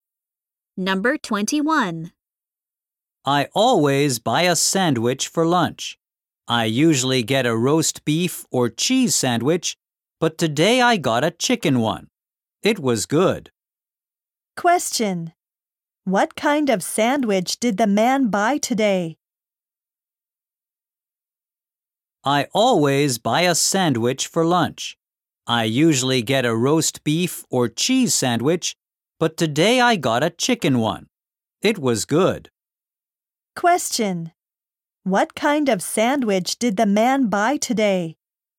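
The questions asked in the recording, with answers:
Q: What kind of sandwich did the man buy today?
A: A chicken sandwich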